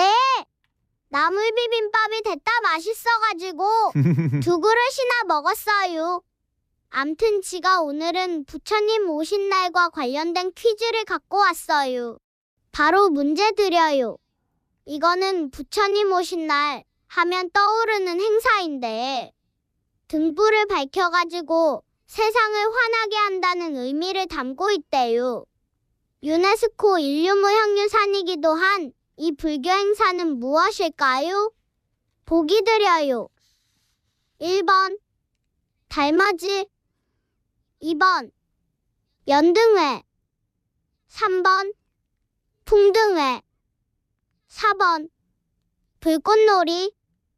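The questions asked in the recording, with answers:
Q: 유네스코 인류무형유산이기도 한 이 불교 행사는 무엇일까요?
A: 2번: 연등회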